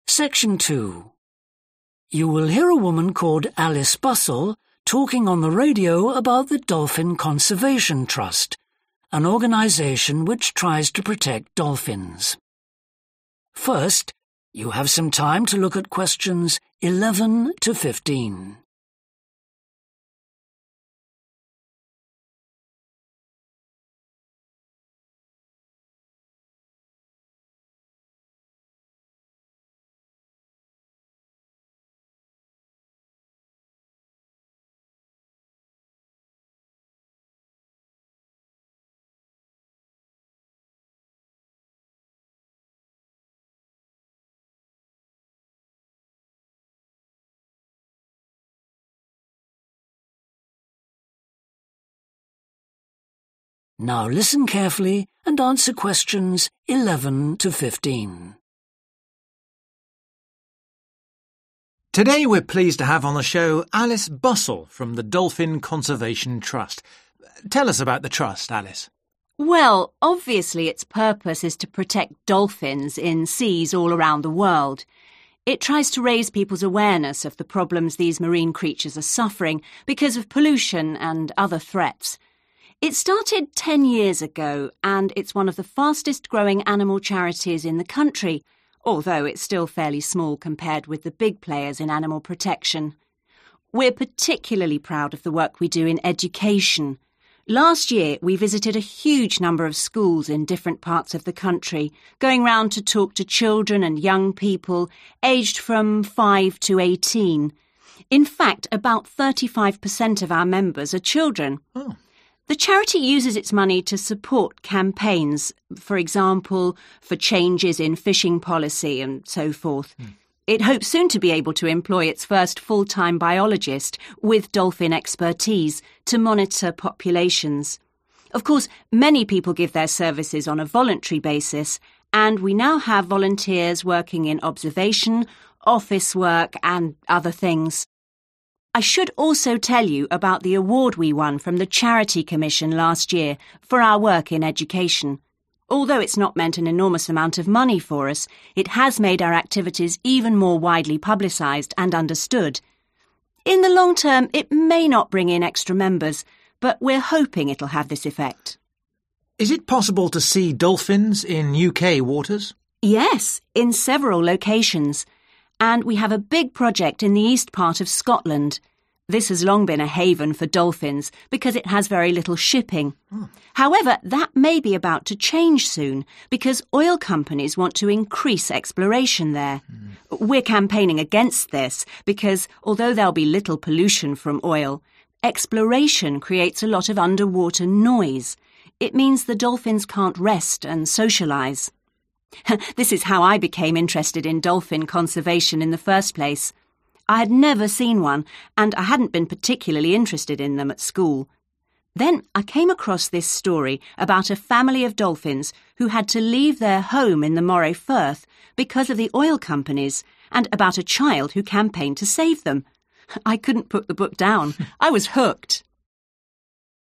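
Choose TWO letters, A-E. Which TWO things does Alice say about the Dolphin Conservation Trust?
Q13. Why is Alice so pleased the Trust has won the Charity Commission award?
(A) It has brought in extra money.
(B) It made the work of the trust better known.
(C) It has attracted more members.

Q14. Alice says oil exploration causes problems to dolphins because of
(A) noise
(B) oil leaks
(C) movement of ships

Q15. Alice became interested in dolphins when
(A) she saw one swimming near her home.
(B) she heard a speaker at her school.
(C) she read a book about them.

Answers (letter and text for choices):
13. (B) It made the work of the trust better known.
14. (A) noise
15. (C) she read a book about them.

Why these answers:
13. Although it's not meant an enormous amount of money for us, it has made our activities even more widely publicized and understood (nó đã giúp cho những hoạt động của tổ chức được tuyên truyền rộng rãi hơn.)
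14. However, that may be about to change soon because oil companies want to increase exploration there. We're campaigning against this because, although there'll be little pollution from oil, exploration creates a lot of underwater noise. (Chúng tôi đang vận động chống lại điều này bởi vì, mặc dù sẽ có ít ô nhiễm từ dầu, nhưng những hoạt động thăm dò sẽ tạo ra nhiều tiếng ồn dưới nước.) It means the dolphins can't rest and socialize.
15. Then I came across this story about a family of dolphins who had to leave their home in the Moray Firth because of the oil companies and about a child who campaigned to save them. I couldn't put the book down – I was hooked. (Sau đó, tôi bắt gặp câu chuyện này về một gia đình cá heo phải rời bỏ nhà của chúng ở Moray Firth bởi vì hoạt động của các công ty dầu mỏ và một đứa trẻ đã làm chiến dịch để cứu chúng. Tôi bị lôi cuốn tới nỗi không thể bỏ quyển sách xuống được. 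) This is how I became interested in dolphin conservation in the first place. I had never seen one and I hadn't been particularly interested in them at school.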